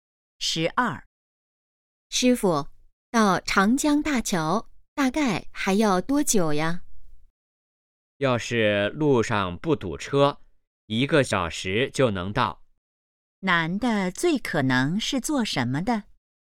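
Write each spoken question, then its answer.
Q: 男的最可能是做什么的?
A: 司机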